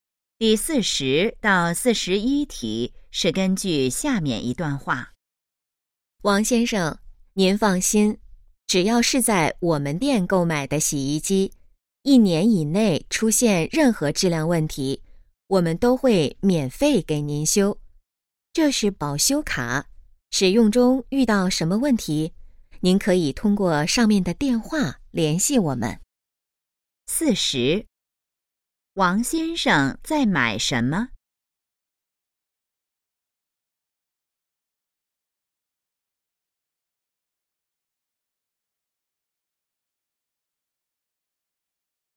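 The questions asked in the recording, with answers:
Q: 王先生在买什么?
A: 洗衣机

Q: 联系电话写在哪儿?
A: 保修卡上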